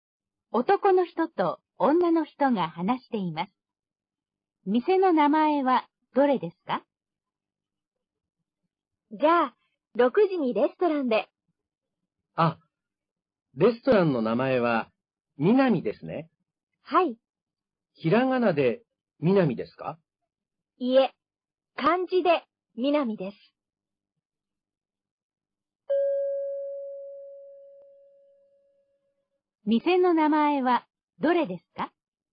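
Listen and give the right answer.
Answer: 漢字の「南」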